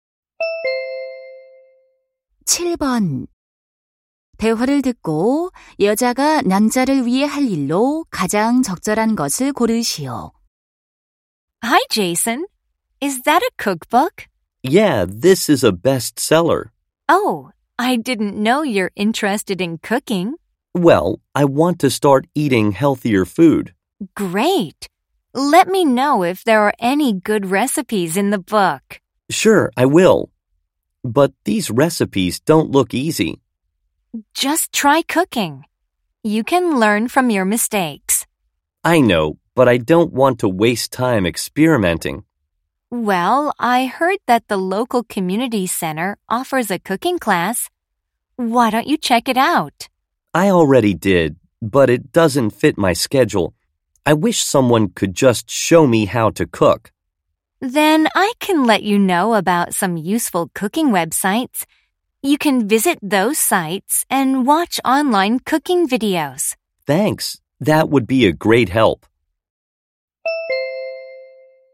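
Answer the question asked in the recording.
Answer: 유용한 요리 웹사이트 알려주기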